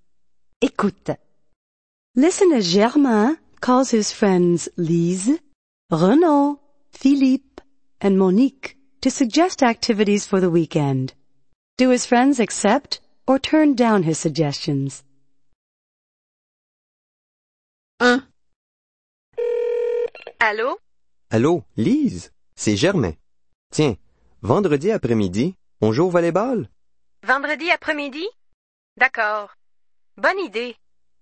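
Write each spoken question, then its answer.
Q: Do his friends accept or turn down his suggestions?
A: Lise accepts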